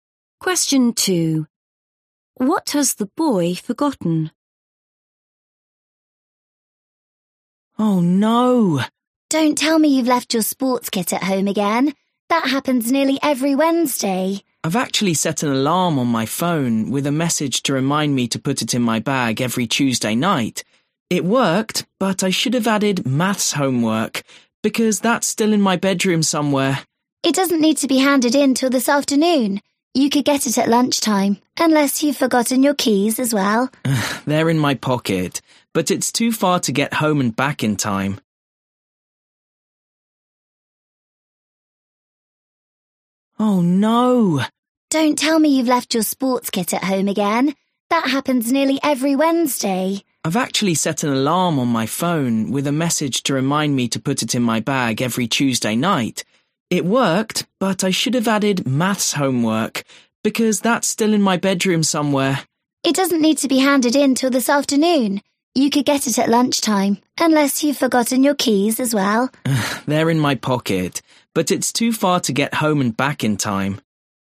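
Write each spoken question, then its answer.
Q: What has the boy forgotten?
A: his maths homework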